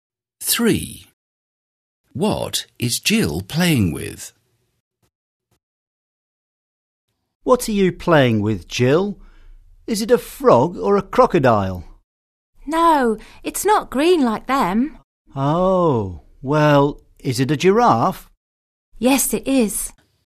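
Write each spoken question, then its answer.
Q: What is Jill playing with?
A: A giraffe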